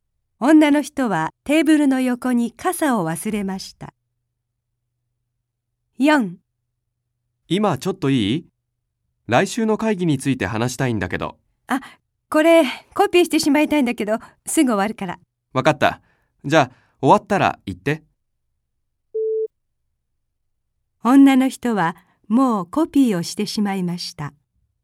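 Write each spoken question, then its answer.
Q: 女の人はもうコピーをしてしまいました。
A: 正しくない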